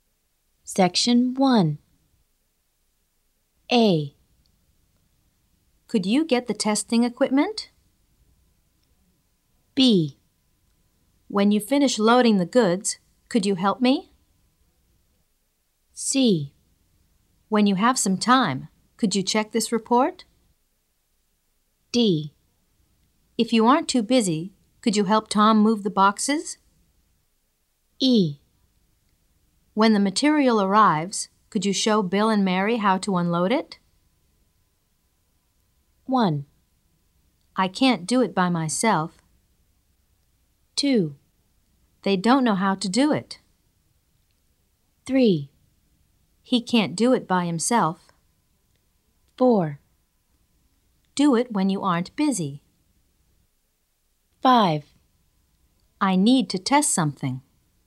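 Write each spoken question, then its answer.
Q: I can't do it by myself.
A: B: When you finish loading the goods, could you help me?

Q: They don't know how to do it.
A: E: When the material arrives, could you show Bill and Mary how to unload it?

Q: He can't do it by himself.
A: D: If you aren't too busy, could you help Tom move the boxes?

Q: I need to test something.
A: A: Could you get the testing equipment?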